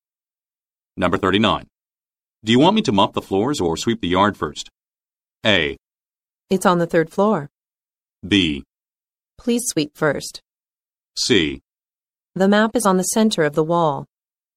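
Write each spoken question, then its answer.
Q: Do you want me to mop the floors or sweep the yard first?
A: B: Please sweep first.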